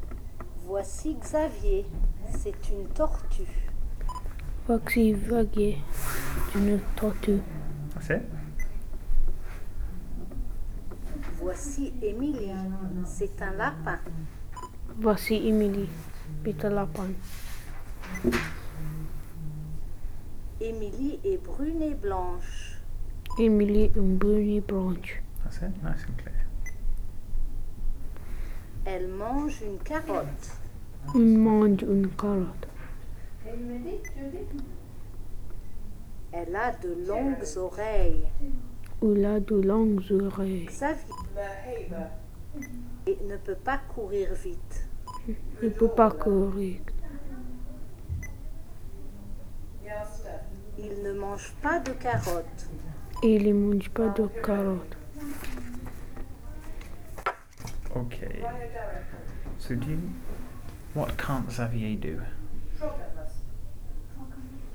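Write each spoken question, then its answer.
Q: what can't Xavier do?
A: Run fast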